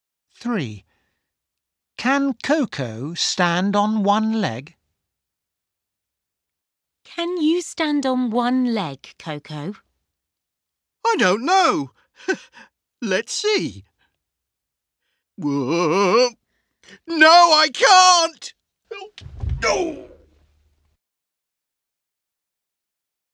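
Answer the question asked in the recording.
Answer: No, she can't.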